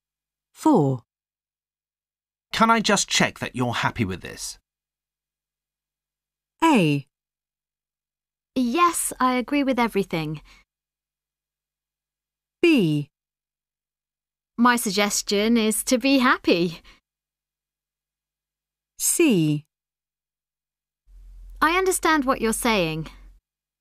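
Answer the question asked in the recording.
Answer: A: Yes, I agree with everything.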